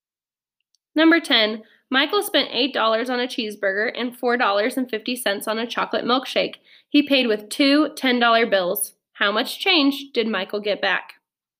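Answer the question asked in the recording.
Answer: $7.50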